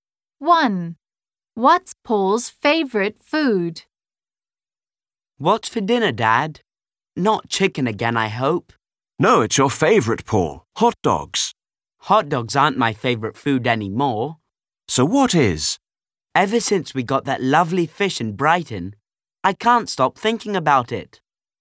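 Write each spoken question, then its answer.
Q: What's Paul's favorite food?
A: fish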